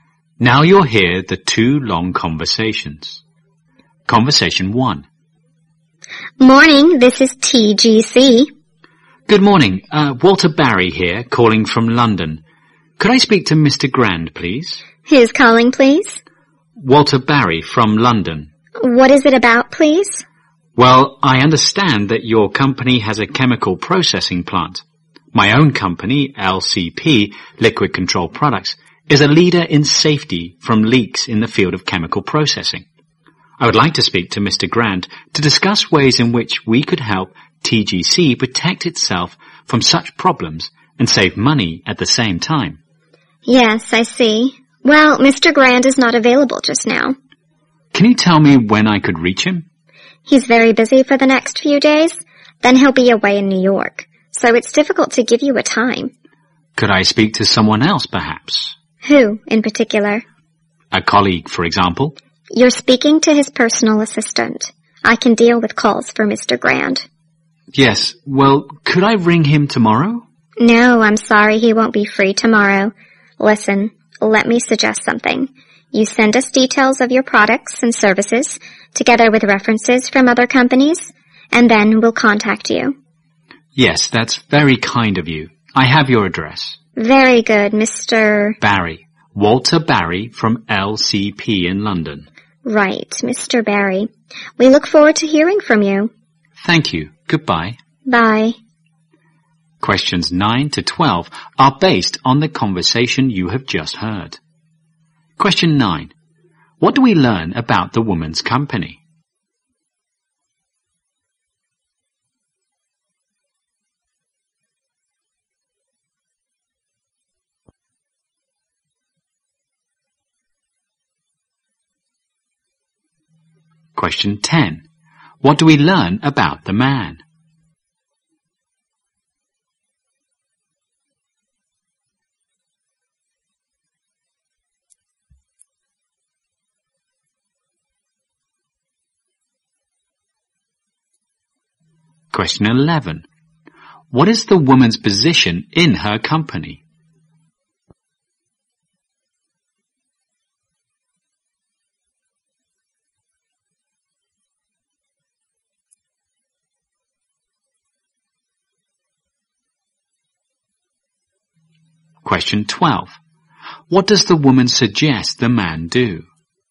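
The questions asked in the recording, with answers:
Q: What do we learn about the woman's company?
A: It has a chemical processing plant.

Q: What do we learn about the man?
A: He works for a company that prevents chemical leaks.

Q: What is the woman's position in her company?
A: Personal assistant to Mr. Grant.

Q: What does the woman suggest the man do?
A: Send details of his products and services with references.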